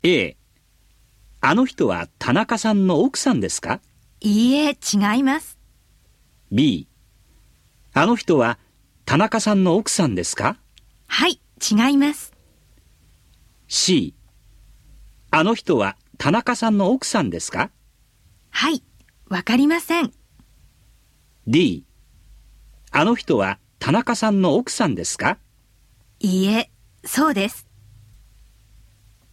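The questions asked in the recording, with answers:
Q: あの人は田中さんの奥さんですか?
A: A: いいえ、違います。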